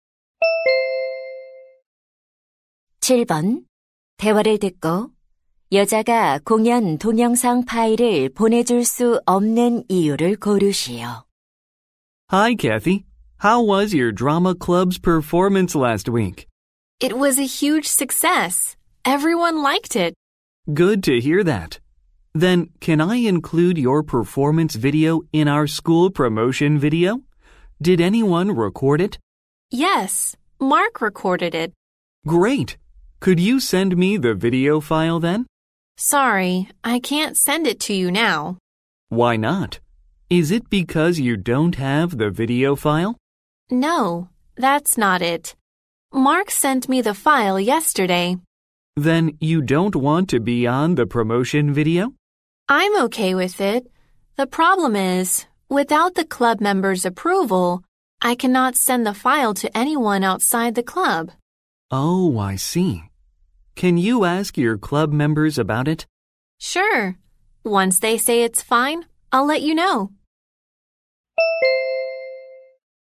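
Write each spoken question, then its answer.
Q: 대화를 듣고 여자가 공연 동영상 파일을 보내줄 수 없는 이유를 고르시오.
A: 동아리 회원들의 승인을 받지 않아서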